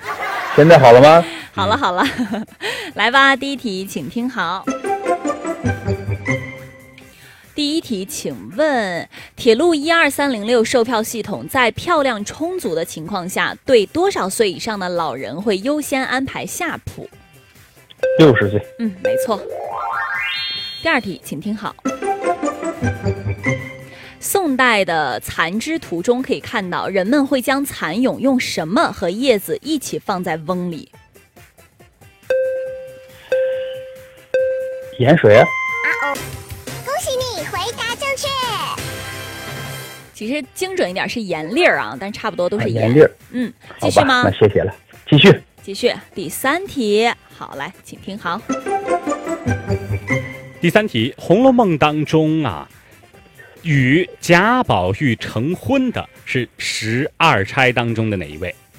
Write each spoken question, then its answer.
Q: 请问铁路12306售票系统在票量充足的情况下,对多少岁以上的老人会优先安排下铺?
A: 嗯,没错。

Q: 宋代的蚕织图中可以看到,人们会将蚕蛹用什么和叶子一起放在瓮里?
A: 其实精准一点是盐粒儿啊